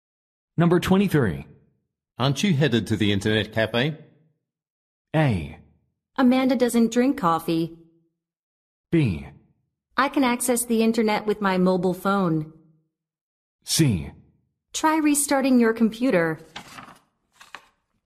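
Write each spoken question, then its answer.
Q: Aren't you headed to the internet cafe?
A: B: I can access the internet with my mobile phone.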